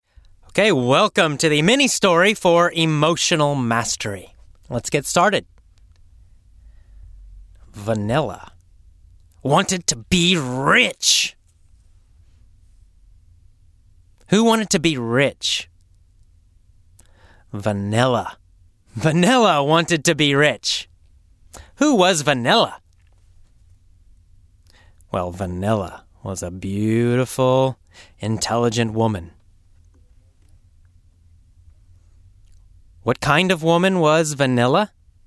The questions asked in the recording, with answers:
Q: What kind of woman was Vanilla?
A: She was a beautiful, intelligent woman.